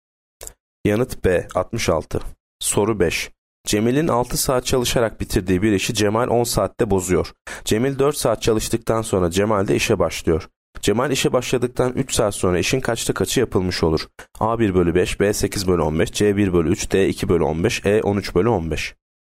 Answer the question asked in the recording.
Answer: Yanıt E 13 bölü 15.